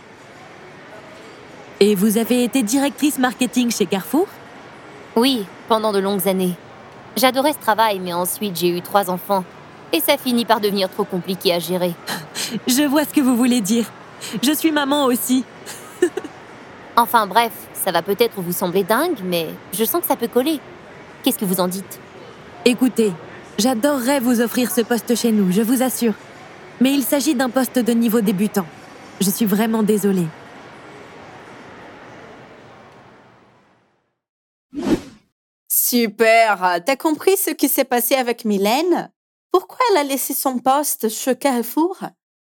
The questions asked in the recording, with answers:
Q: Pourquoi elle a laissé son poste chez Carrefour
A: mais ensuite j'ai eu trois enfants et ça finit par devenir trop compliqué à gérer.